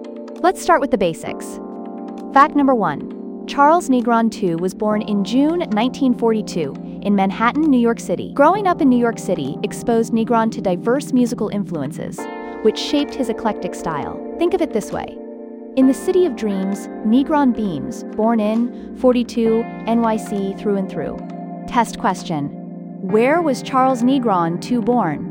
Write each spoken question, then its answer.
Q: Where was Charles Negron II born?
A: Correct answer, Manhattan, New York City.